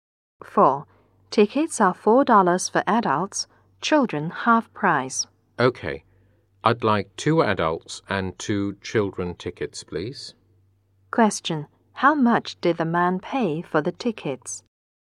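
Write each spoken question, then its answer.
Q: How much did the man pay for the tickets?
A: $12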